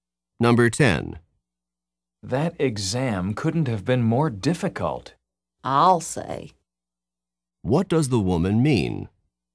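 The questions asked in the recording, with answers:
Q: What does the woman mean?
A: She agrees the exam was extremely difficult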